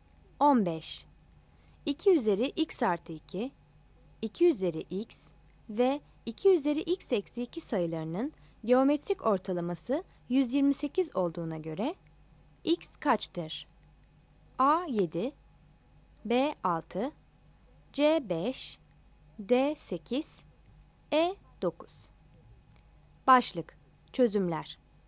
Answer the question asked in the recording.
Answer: Yanıt A'dır.